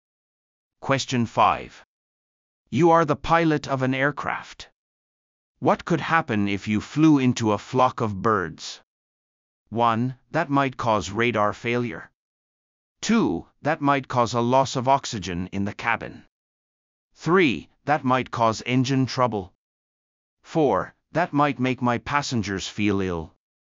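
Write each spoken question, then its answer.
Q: What could happen if you flew into a flock of birds?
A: 3: That might cause engine trouble.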